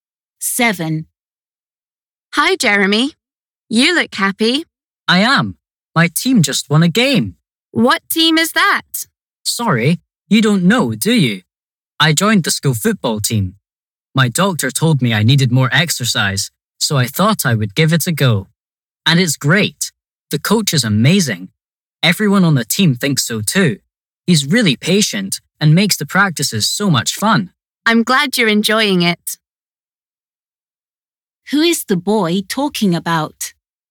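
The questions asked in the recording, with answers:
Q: Who is the boy talking about?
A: his football coach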